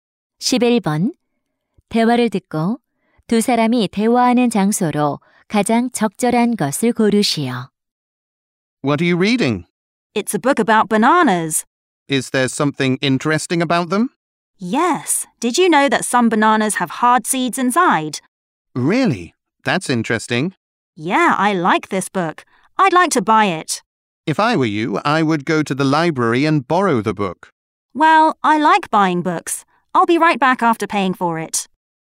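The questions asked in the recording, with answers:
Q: 대화를 듣고 두 사람이 대화하는 장소로 가장 적절한 것을 고르시오.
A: 서점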